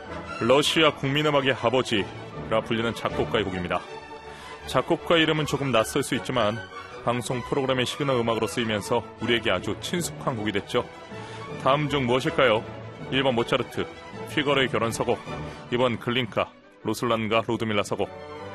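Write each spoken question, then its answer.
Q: 다음 중 무엇일까요?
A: 2번: 글린카, 루슬란과 루드밀라 서곡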